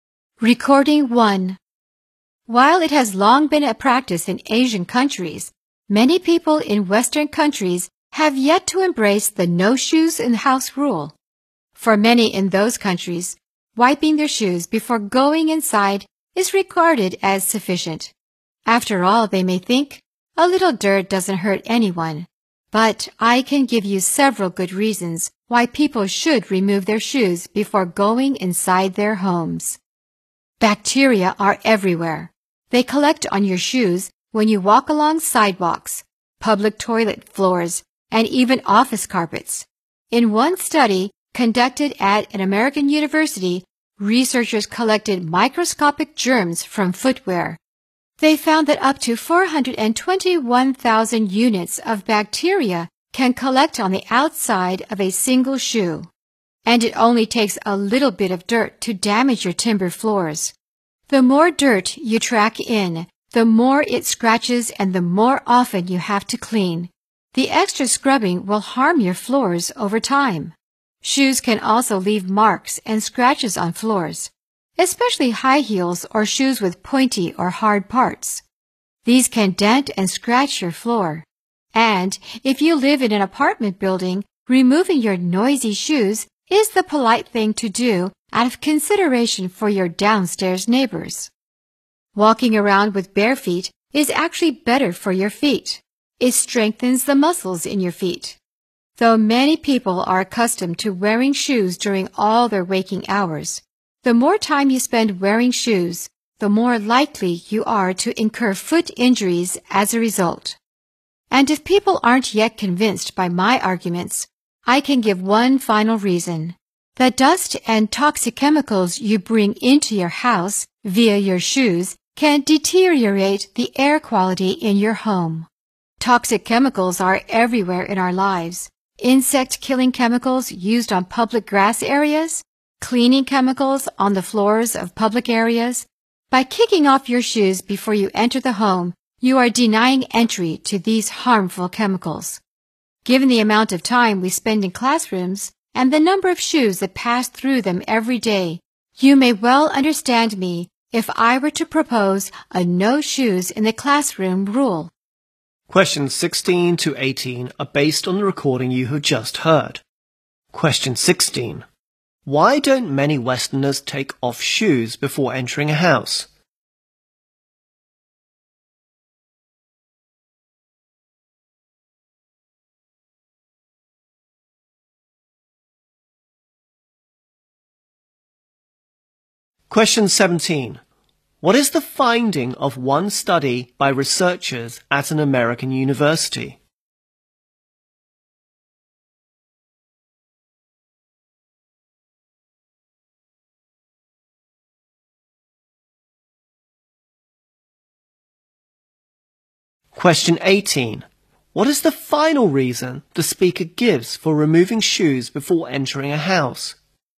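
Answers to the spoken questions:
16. They think wiping their shoes is enough
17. Up to 421,000 units of bacteria can collect on the outside of a single shoe
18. Dust and toxic chemicals from shoes worsen the air quality at home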